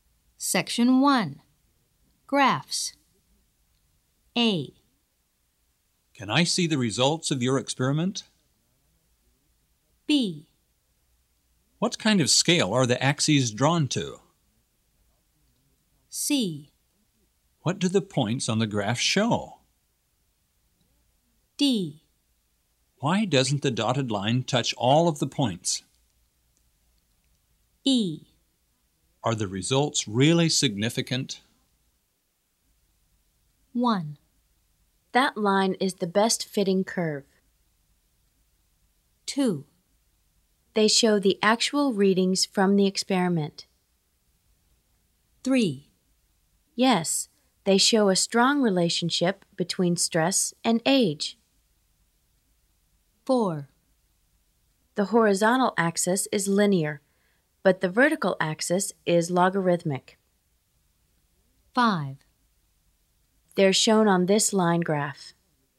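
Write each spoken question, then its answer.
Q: Can I see the results of your experiment?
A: 5: They're shown on this line graph.

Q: What kind of scale are the axes drawn to?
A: 4: The horizontal axis is linear, but the vertical axis is logarithmic.

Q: What do the points on the graph show?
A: 2: They show the actual readings from the experiment.

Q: Why doesn't the dotted line touch all of the points?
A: 1: That line is the best fitting curve.

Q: Are the results really significant?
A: 3: Yes, they show a strong relationship between stress and age.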